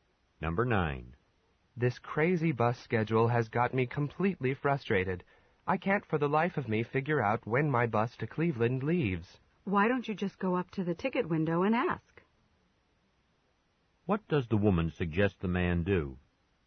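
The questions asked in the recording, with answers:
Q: What does the woman suggest the man do?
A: Ask at the ticket window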